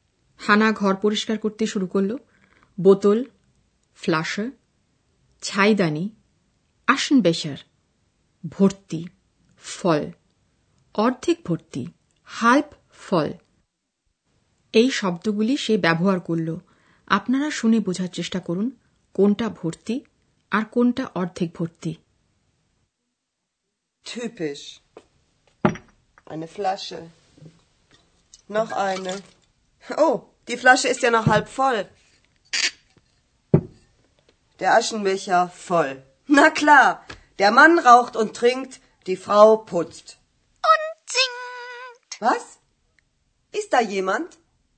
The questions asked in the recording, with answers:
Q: কোনটা ভর্তি আর কোনটা অর্ধেক ভর্তি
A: ছাইদানিটা ভর্তি মদিরার একটি বোতল অর্ধেক ভর্তি